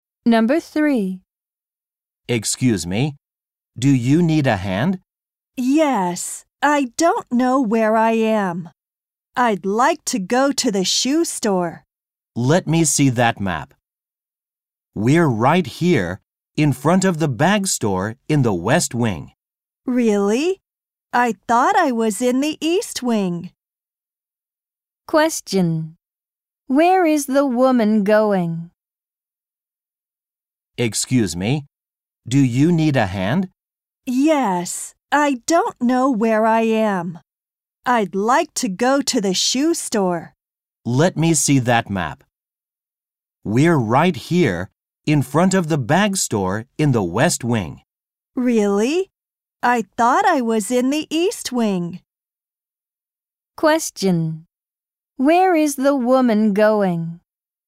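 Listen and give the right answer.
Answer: To the shoe store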